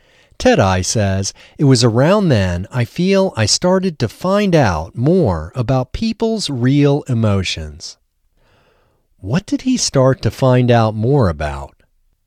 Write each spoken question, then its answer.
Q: What did he start to find out more about?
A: He started to find out more about people's real emotions.